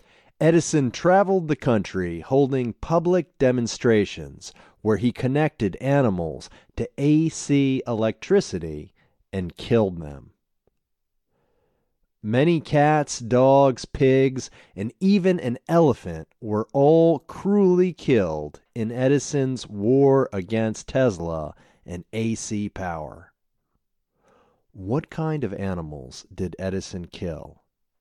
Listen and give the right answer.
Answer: He killed cats, dogs, pigs, and even an elephant.